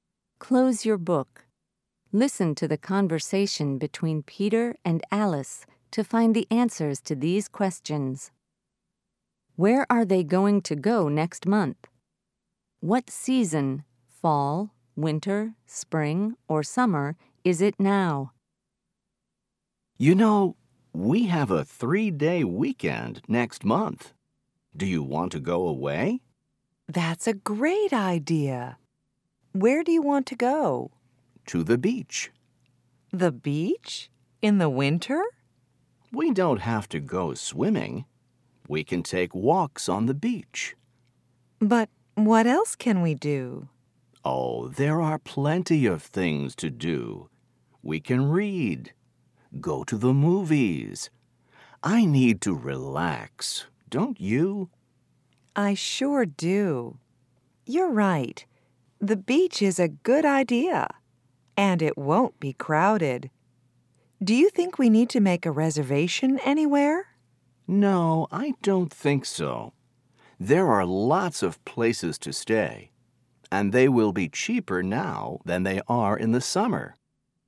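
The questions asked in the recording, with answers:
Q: Where are they going to go next month?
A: To the beach

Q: What season, fall, winter, spring, or summer, is it now?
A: Winter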